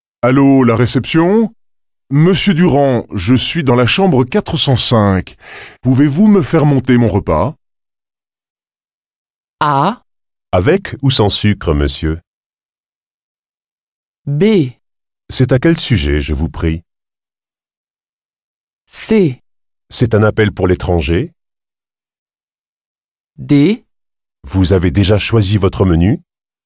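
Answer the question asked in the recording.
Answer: D: Vous avez déjà choisi votre menu ?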